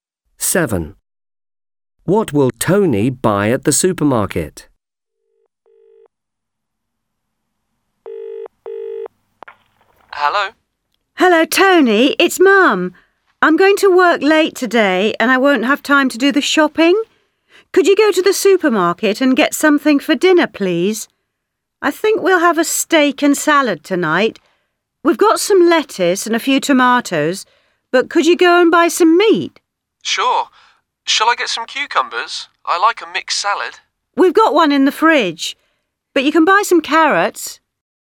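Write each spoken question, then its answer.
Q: What will Tony buy at the supermarket?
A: meat and carrots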